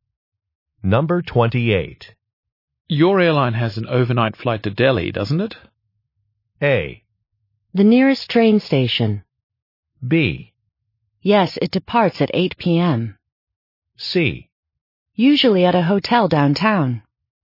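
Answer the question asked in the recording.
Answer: B: Yes, it departs at 8 p.m.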